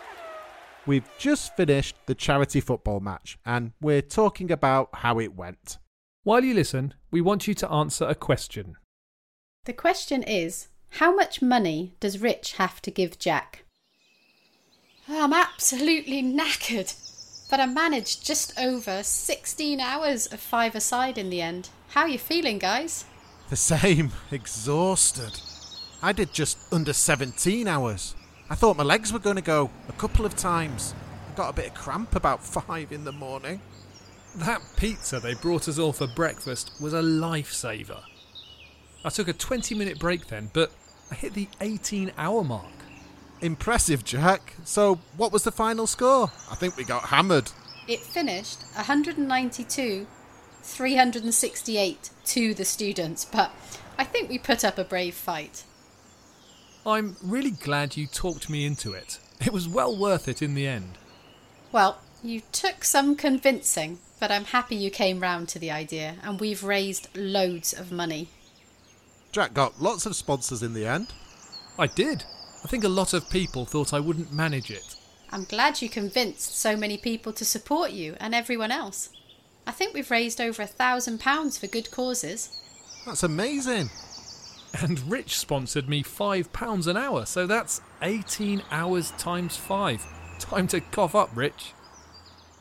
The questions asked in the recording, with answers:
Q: how much money does Rich have to give Jack?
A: £90.